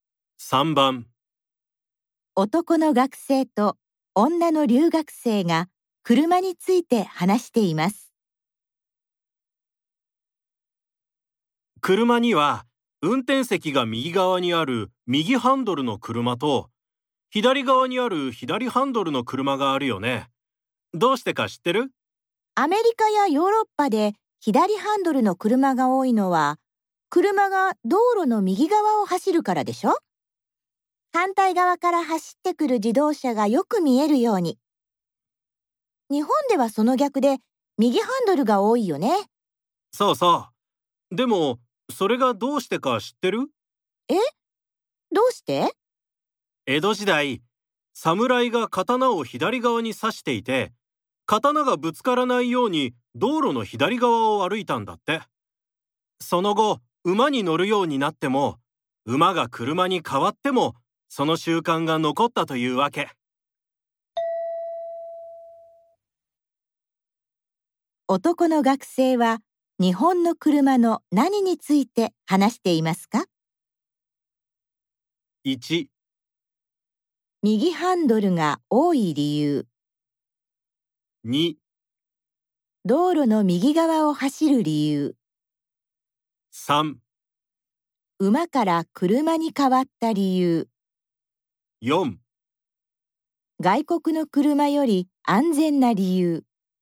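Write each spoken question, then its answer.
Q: 男の学生は、日本の車の何について話していますか?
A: 1: 右ハンドルが多い理由。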